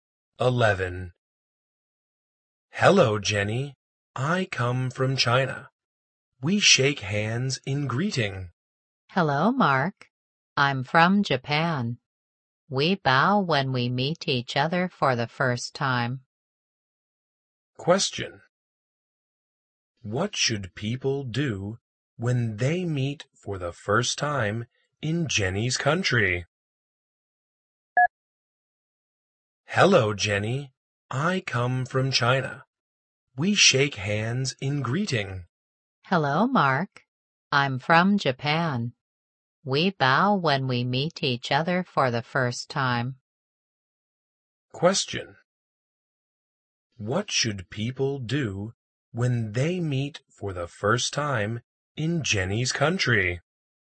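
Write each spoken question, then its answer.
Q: What should people do when they meet for the first time in Jenny's country?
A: Bow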